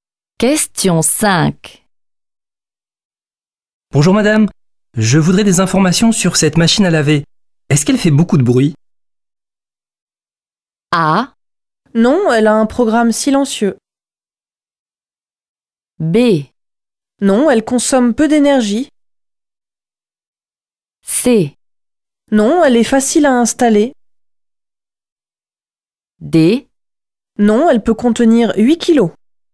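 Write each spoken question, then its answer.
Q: Est-ce qu'elle fait beaucoup de bruit?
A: A: Non, elle a un programme silencieux.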